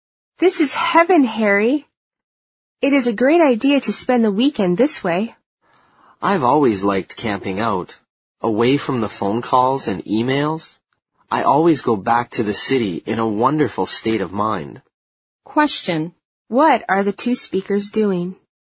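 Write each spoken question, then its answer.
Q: What are the two speakers doing?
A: Camping out for the weekend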